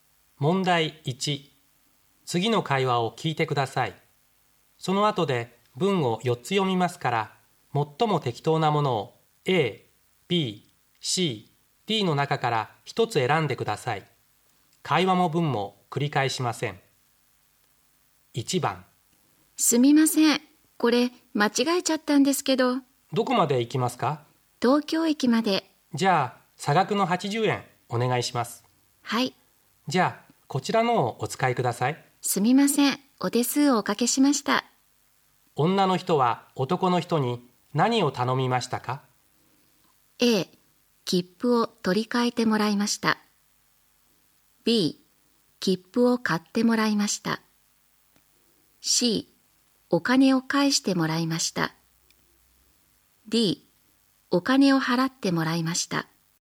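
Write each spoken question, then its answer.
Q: 女の人は男の人に何を頼みましたか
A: A: 切符を取り替えてもらいました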